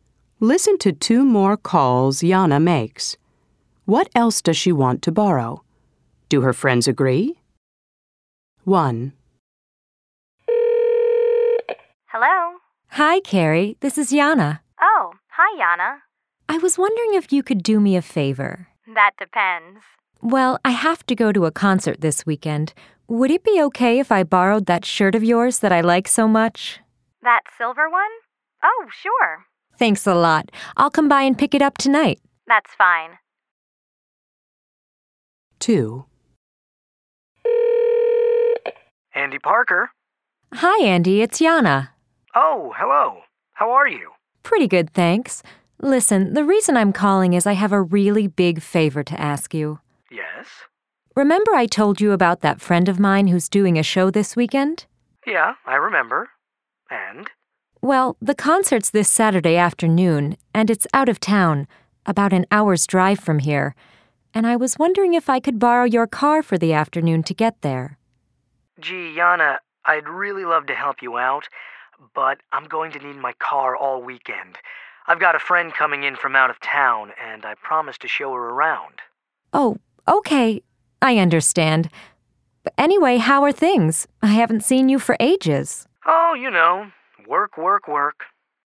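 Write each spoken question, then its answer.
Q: What else does she want to borrow?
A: Carrie's silver shirt and Andy's car

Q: Do her friends agree?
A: Carrie agrees; Andy says no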